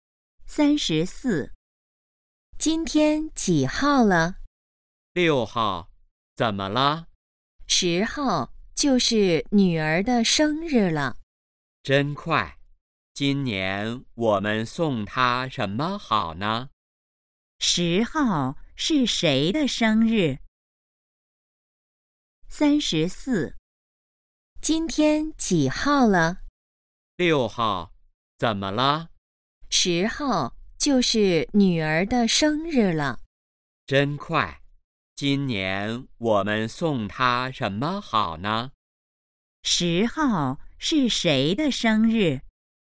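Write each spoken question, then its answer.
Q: 10号是谁的生日?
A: 女儿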